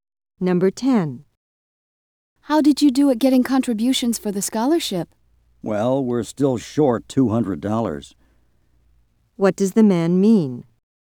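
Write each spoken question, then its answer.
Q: What does the man mean?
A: They still need $200 more for the scholarship.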